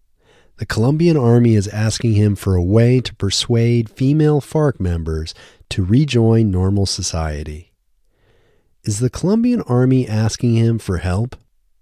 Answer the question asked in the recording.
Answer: Yes, the Colombian Army is asking him for help.